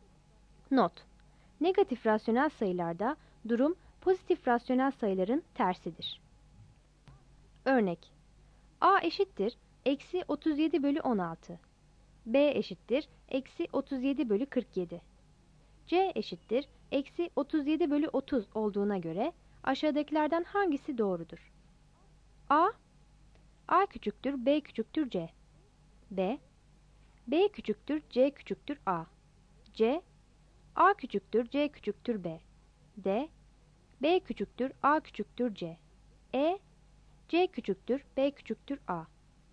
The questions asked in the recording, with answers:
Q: C eşittir eksi 37 bölü 30 olduğuna göre aşağıdakilerden hangisi doğrudur?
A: Yanıt C.